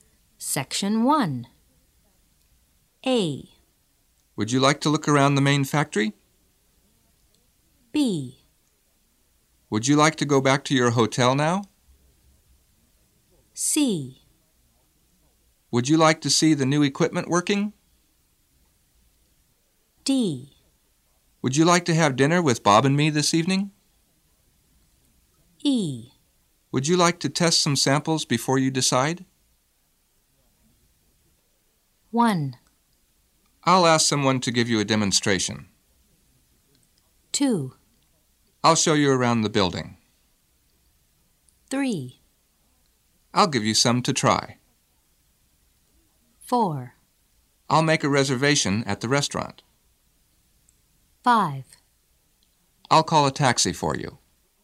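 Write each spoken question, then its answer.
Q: I'll ask someone to give you a demonstration.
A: C: Would you like to see the new equipment working?

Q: I'll show you around the building.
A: A: Would you like to look around the main factory?

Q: I'll give you some to try.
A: E: Would you like to test some samples before you decide?

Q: I'll make a reservation at the restaurant.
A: D: Would you like to have dinner with Bob and me this evening?

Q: I'll call a taxi for you.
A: B: Would you like to go back to your hotel now?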